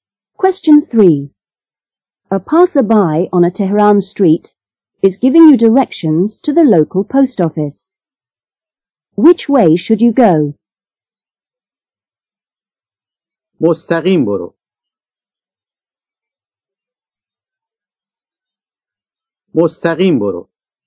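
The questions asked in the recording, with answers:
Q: Which way should you go?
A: Straight ahead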